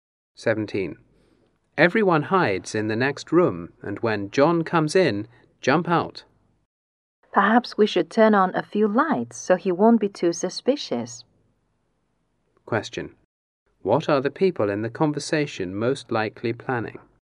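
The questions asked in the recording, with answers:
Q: What are the people in the conversation most likely planning?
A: A surprise party for John.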